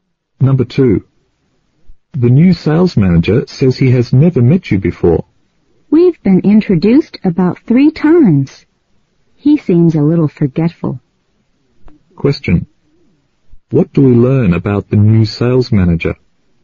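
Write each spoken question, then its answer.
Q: What do we learn about the new sales manager?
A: He is forgetful; he has met the speaker several times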